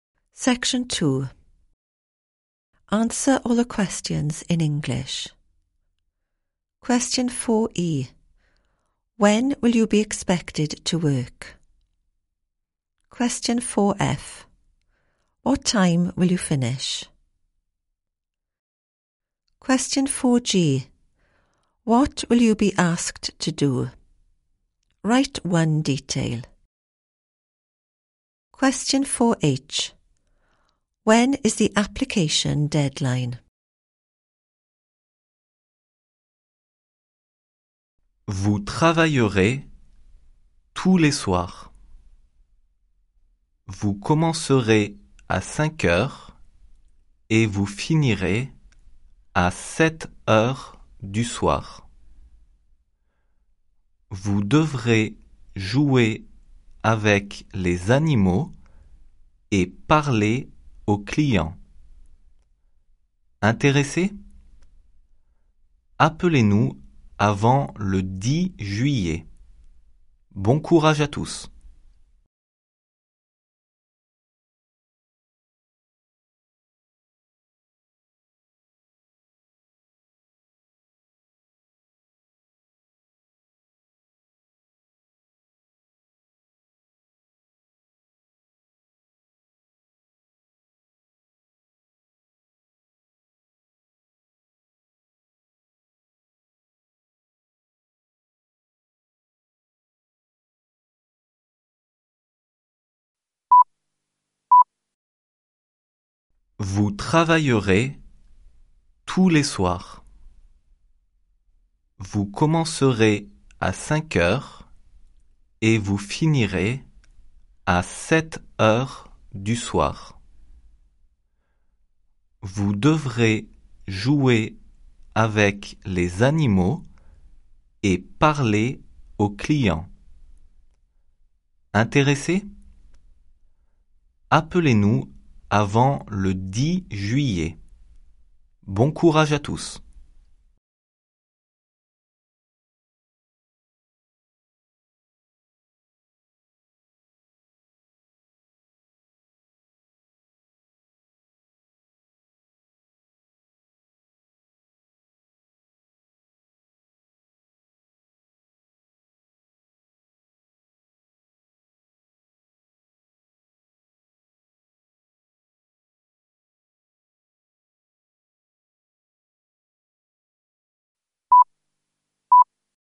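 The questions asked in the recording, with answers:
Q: When will you be expected to work?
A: Every evening

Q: What time will you finish?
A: 7 pm

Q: What will you be asked to do?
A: Play with the animals / talk to customers

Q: When is the application deadline?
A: Before 10 July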